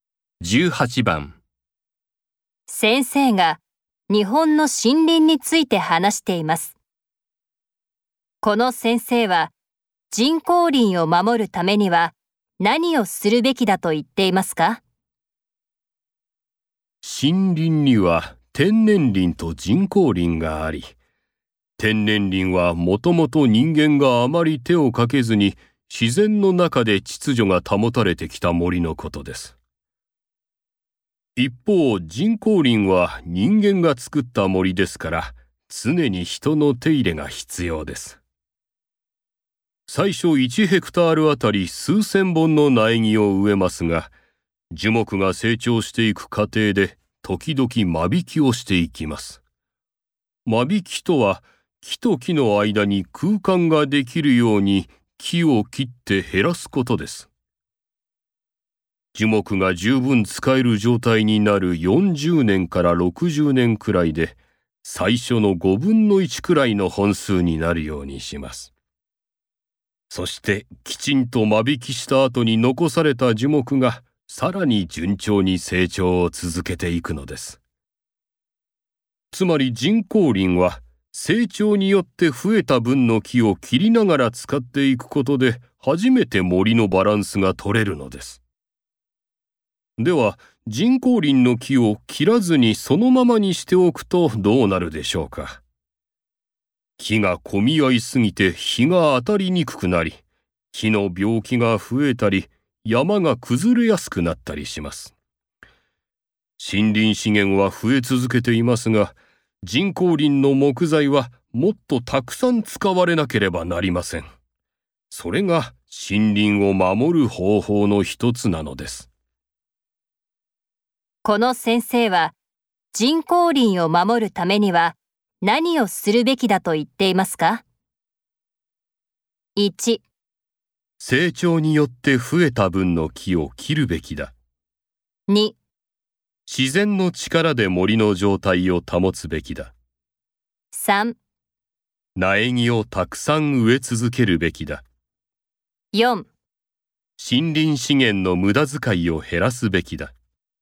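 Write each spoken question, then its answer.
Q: この先生は人工林を守るためには何をするべきだと言っていますか?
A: 1: 成長によって増えた分の木を切るべきだ。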